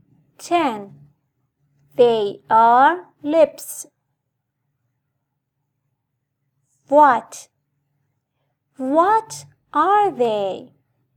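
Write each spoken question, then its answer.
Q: What are they?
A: lips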